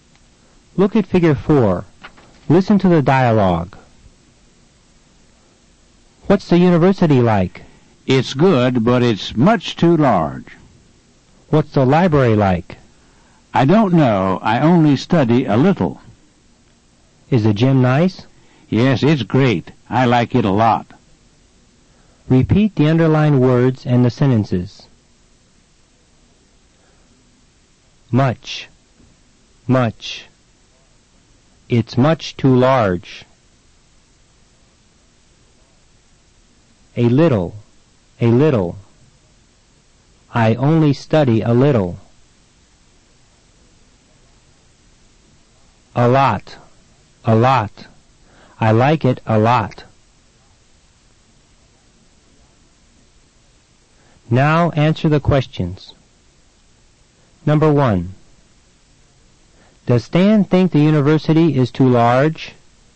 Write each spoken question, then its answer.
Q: Does Stan think the university is too large?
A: Yes, he does.